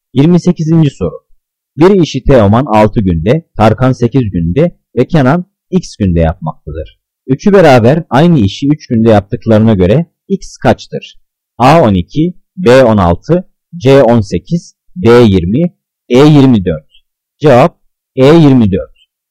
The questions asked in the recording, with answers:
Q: Üçü beraber aynı işi 3 günde yaptıklarına göre X kaçtır?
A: Cevap E24.